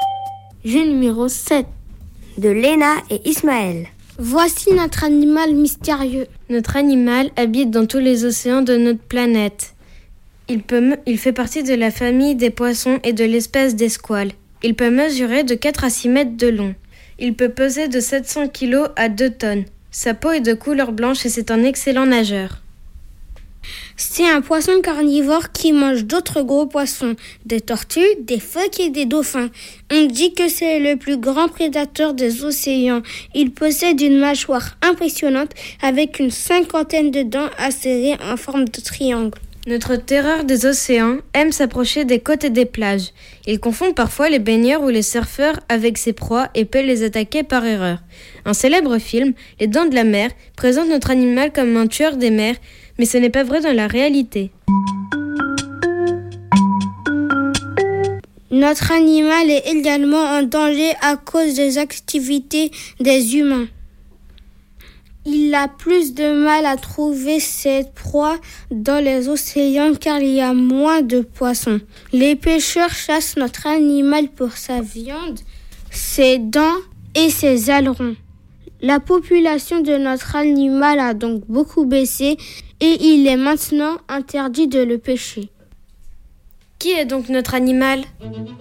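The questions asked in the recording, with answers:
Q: Qui est donc notre animal ?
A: le grand requin blanc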